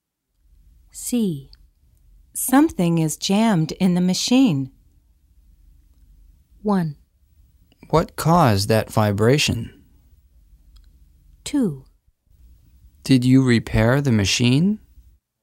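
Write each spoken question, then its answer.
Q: Something is jammed in the machine.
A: 1: What caused that vibration?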